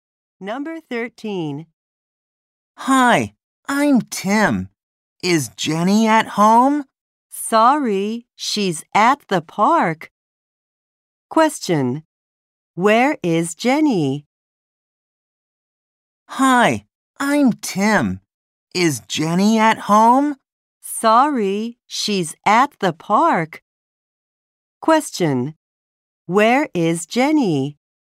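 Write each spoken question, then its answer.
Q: Where is Jenny?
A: At the park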